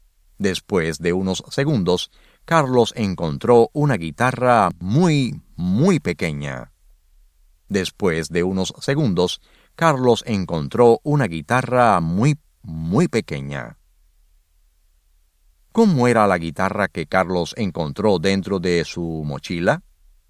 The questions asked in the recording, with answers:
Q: ¿Cómo era la guitarra que Carlos encontró dentro de su mochila?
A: La guitarra que Carlos encontró dentro de su mochila era muy, muy pequeña.